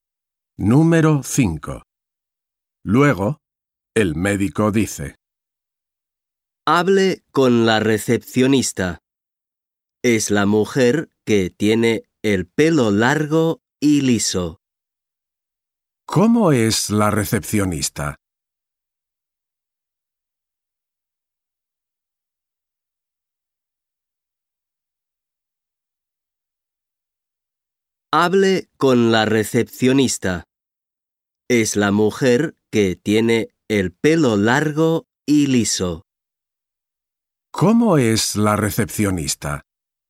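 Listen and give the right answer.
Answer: tiene el pelo largo y liso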